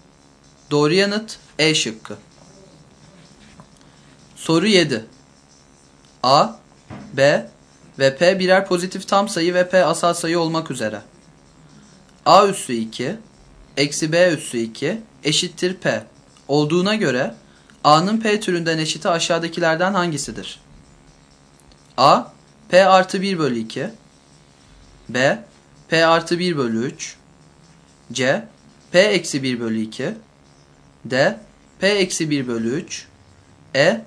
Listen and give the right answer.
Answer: Doğru yanıt A şıkkı.